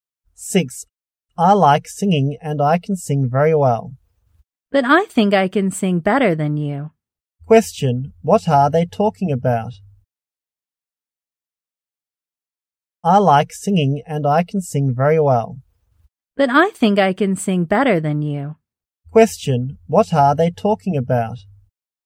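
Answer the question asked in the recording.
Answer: Singing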